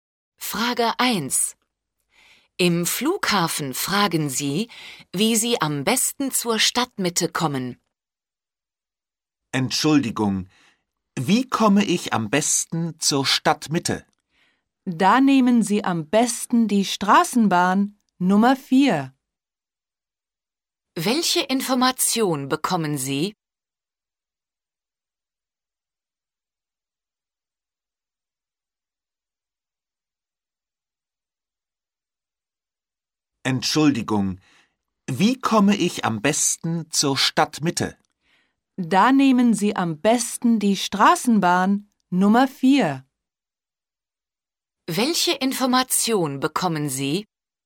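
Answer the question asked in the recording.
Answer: Am besten nimmt man die Straßenbahn Nummer 4.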